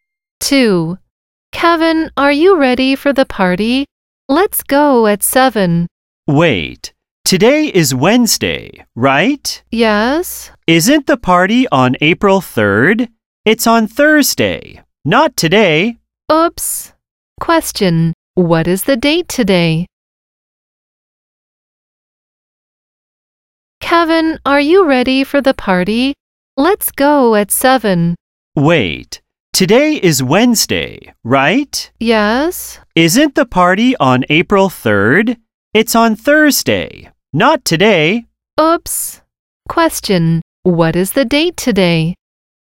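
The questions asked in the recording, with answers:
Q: what is the date today?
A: April 2nd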